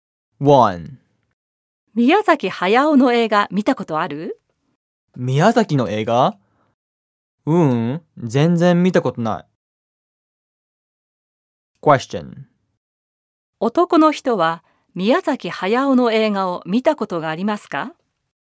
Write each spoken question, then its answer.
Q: 男の人は宮崎駿の映画を見たことがありますか?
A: いいえ、一本も見たことがありません。